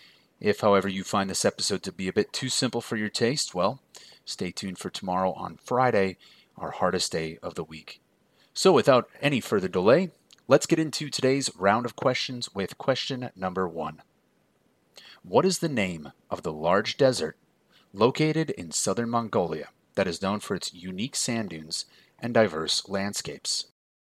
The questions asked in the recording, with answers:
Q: What is the name of the large desert located in southern Mongolia that is known for its unique sand dunes and diverse landscapes?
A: And that desert is the Gobi Desert.